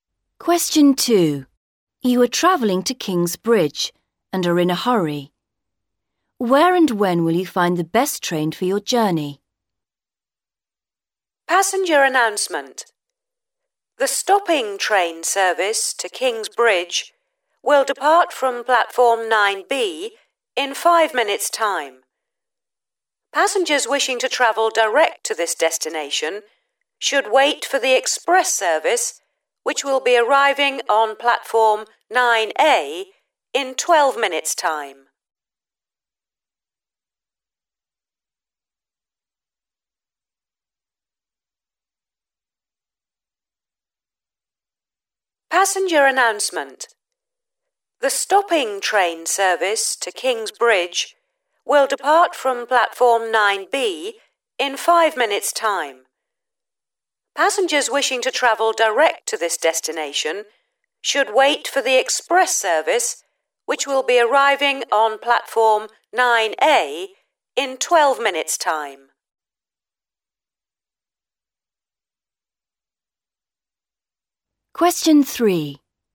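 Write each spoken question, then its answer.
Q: Where and when will you find the best train for your journey?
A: Platform 9A in 12 minutes' time (express service)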